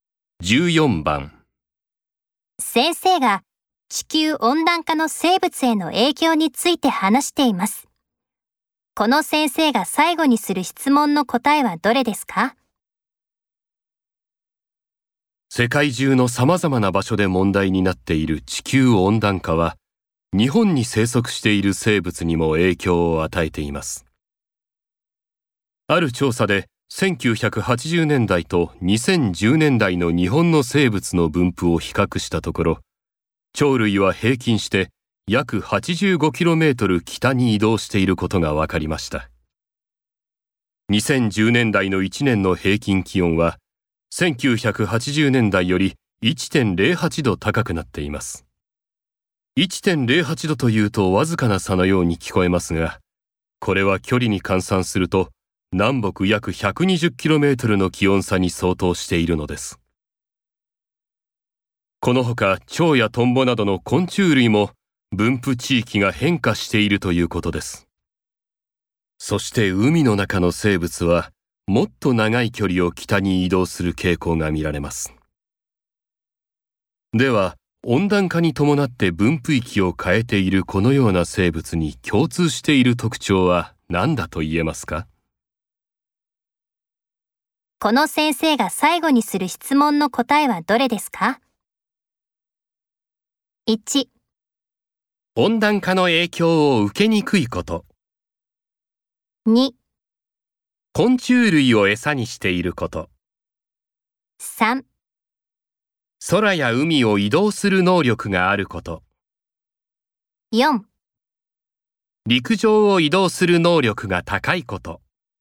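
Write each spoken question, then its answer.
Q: この先生が最後にする質問の答えはどれですか?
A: 3: 空や海を移動する能力があること。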